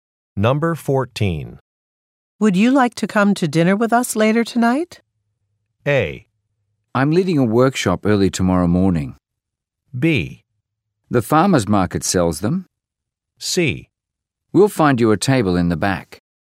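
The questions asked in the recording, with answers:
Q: Would you like to come to dinner with us later tonight?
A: A: I'm leading a workshop early tomorrow morning.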